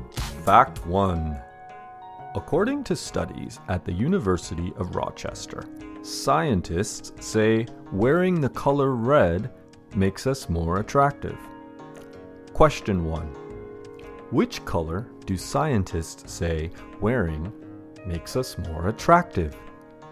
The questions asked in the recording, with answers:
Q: Which color do scientists say wearing makes us more attractive?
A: According to studies at the University of Rochester, scientists say wearing the color red makes us more attractive.